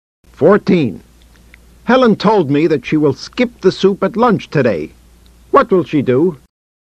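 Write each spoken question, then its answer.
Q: What will she do?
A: Skip the soup at lunch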